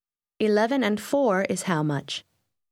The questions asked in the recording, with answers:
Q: 11 and 4 is how much?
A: 15.